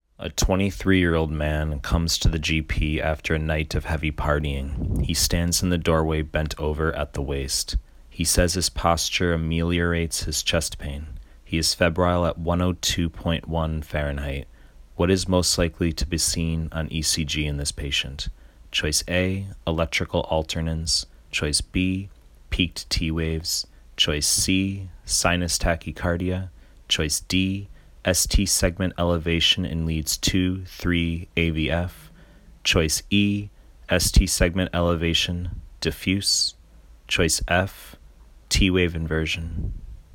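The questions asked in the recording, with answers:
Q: What is most likely to be seen on ECG in this patient?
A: E: ST segment elevation, diffuse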